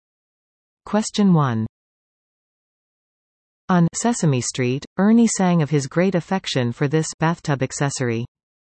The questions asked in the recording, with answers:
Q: On Sesame Street, Ernie sang of his great affection for this bathtub accessory.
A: The answer? The rubber ducky.